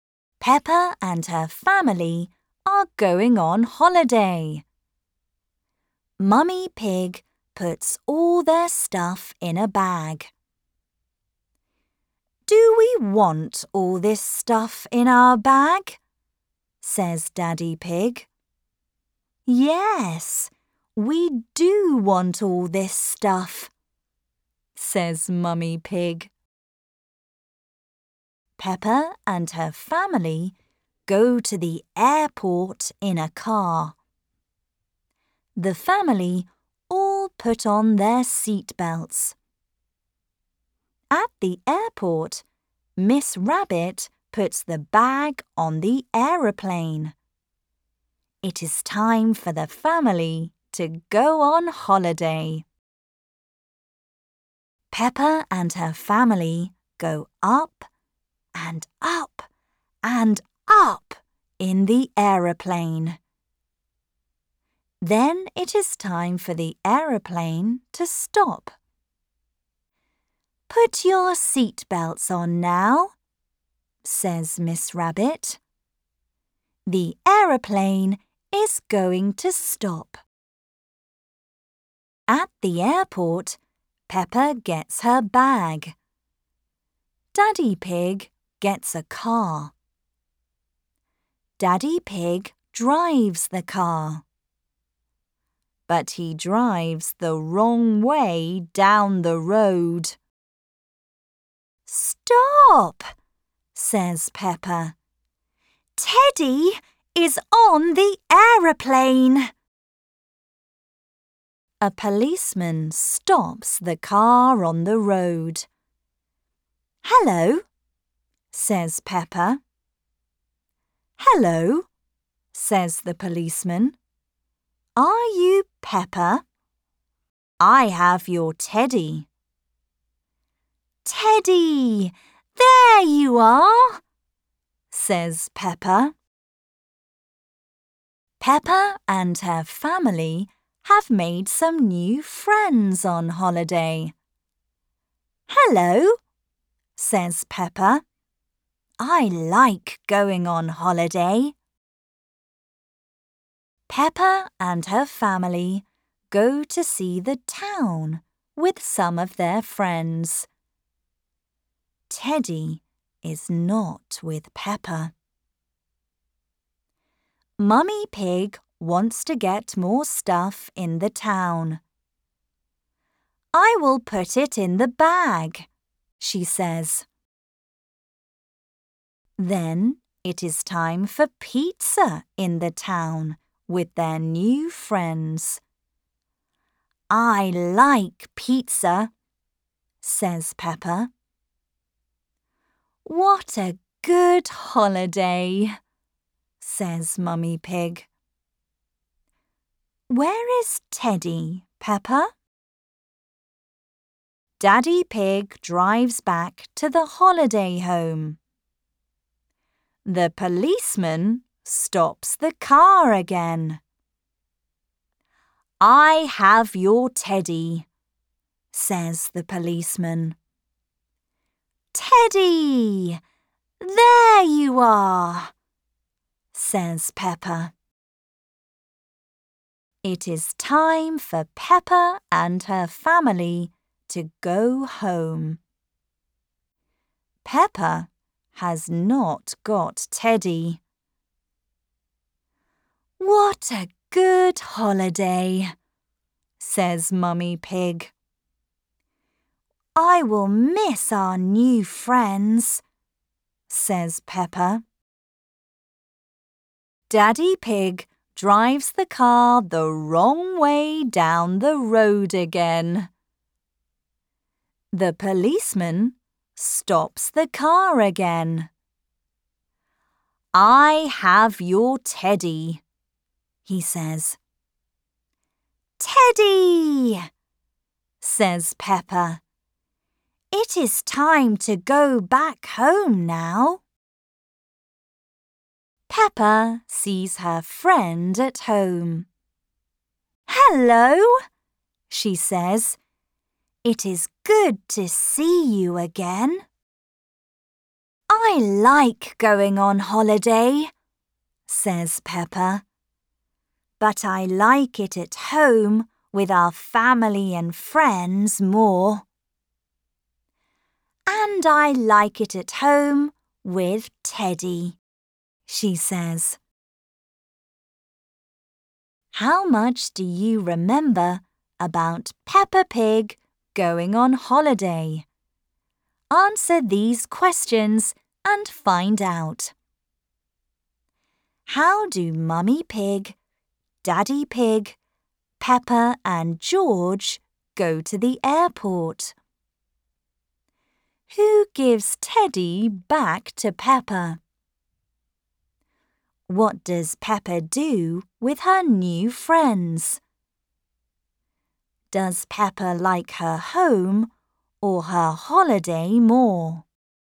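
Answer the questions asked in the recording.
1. In a car
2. The policeman
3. She goes to see the town and has pizza with them
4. Her home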